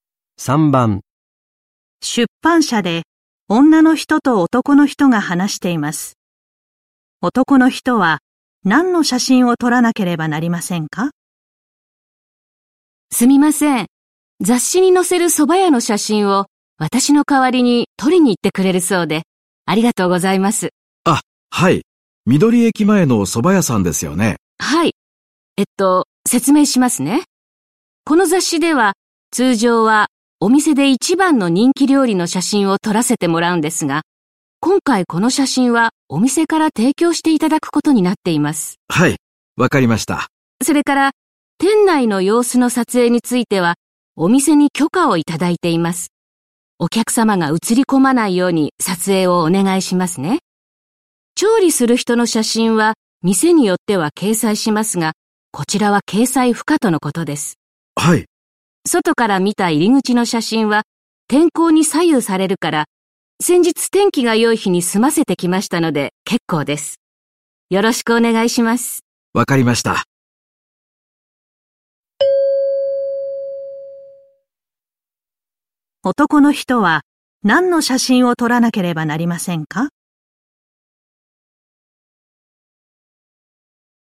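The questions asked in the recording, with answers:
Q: 男の人は何の写真を撮らなければなりませんか?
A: 店内の様子の写真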